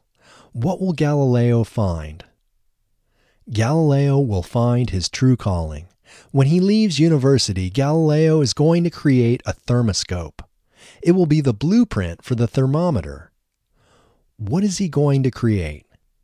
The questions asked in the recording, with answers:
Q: What is he going to create?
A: He is going to create a thermoscope.